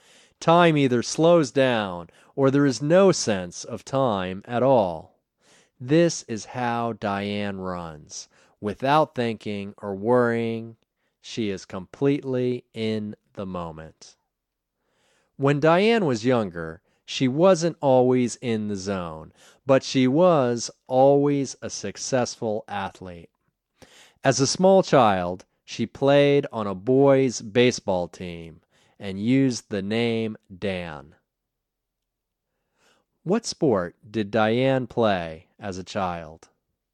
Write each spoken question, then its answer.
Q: What sport did Diane play as a child?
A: As a child, Diane played boys' baseball.